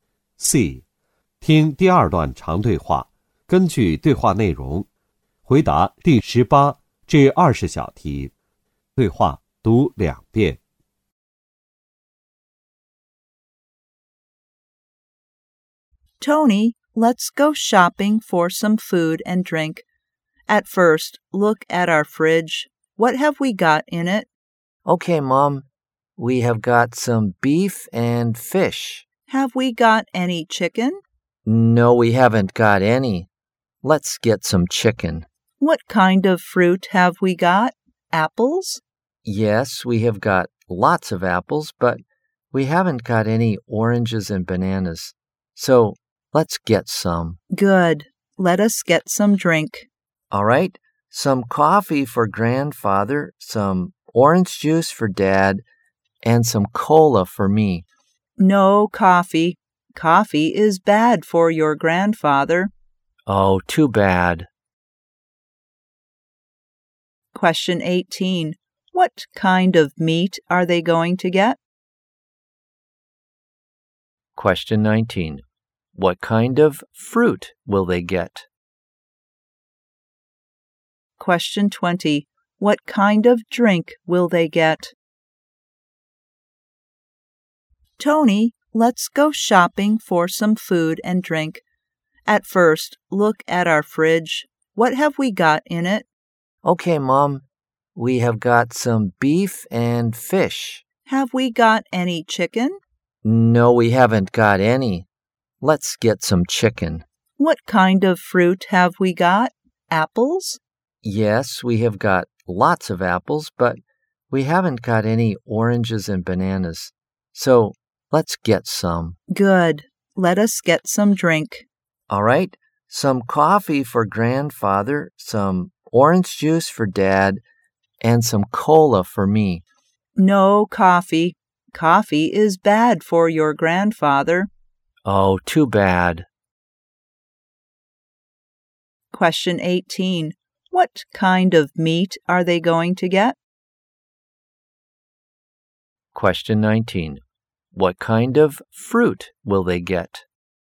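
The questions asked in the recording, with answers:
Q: What kind of meat are they going to get?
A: Chicken

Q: What kind of fruit will they get?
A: Oranges and bananas

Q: What kind of drink will they get?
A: Orange juice and cola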